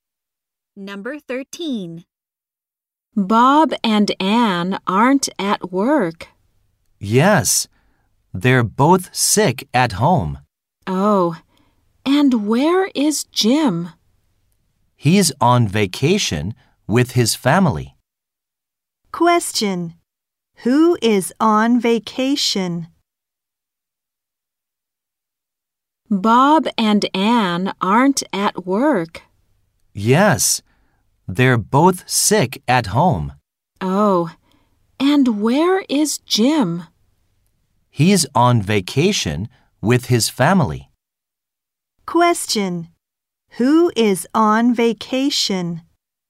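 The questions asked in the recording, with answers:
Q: Who is on vacation?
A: Jim.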